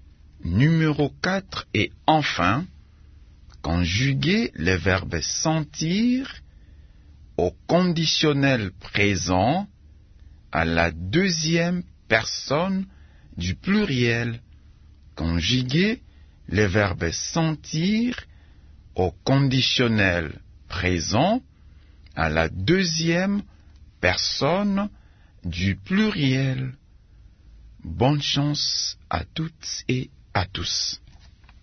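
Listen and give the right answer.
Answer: Vous sentiriez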